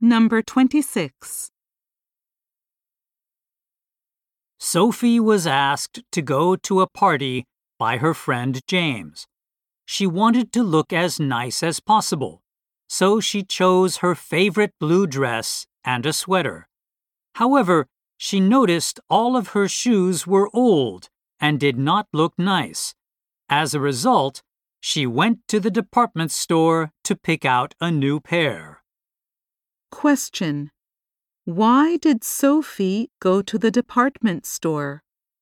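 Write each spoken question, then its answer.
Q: Why did Sophie go to the department store?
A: To buy new shoes for the party.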